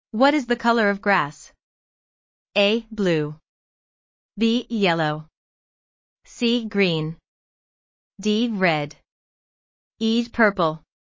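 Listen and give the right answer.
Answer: C: Green.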